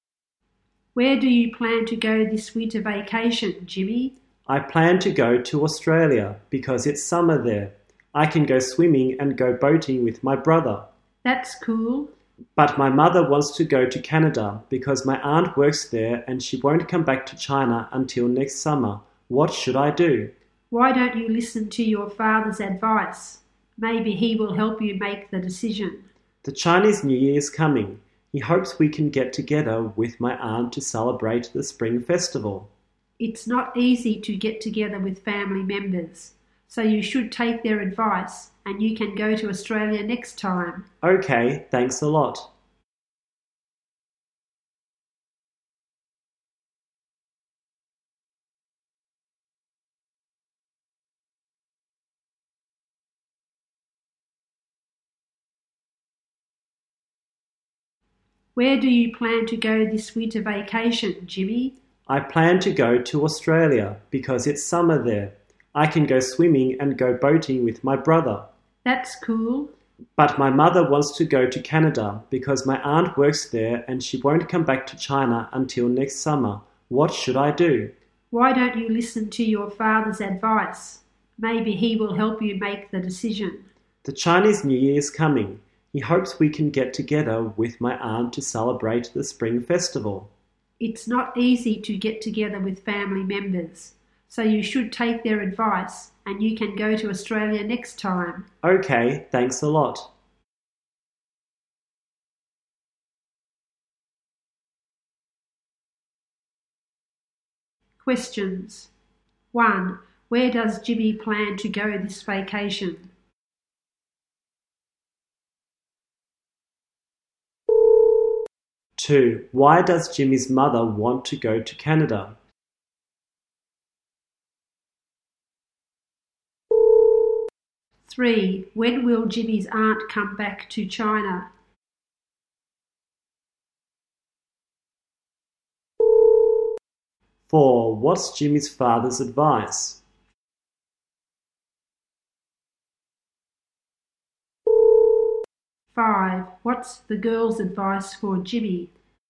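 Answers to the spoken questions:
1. Australia
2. Because Jimmy's aunt works there
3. Next summer
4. To get together with the aunt to celebrate the Spring Festival
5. Take his parents' advice and go to Australia next time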